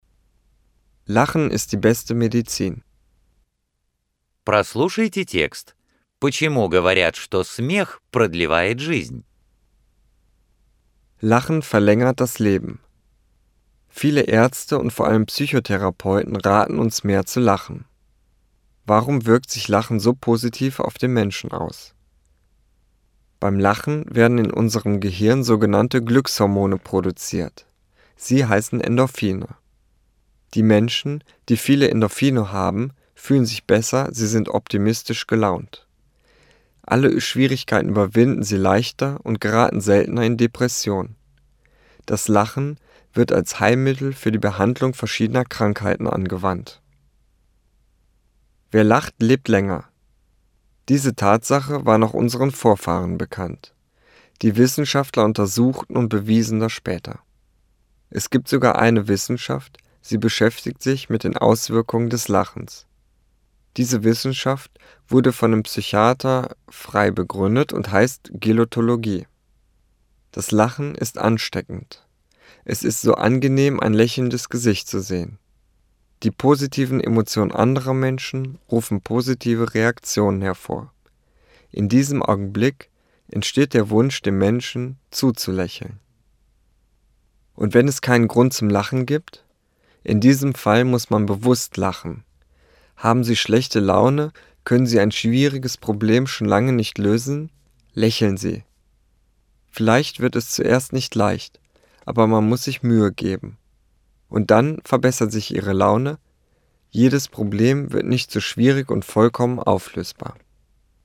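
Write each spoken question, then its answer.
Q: Почему говорят, что смех продлевает жизнь?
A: При смехе в мозге вырабатываются гормоны счастья (эндорфины): люди чувствуют себя лучше, настроены оптимистично, легче справляются с трудностями и реже впадают в депрессию.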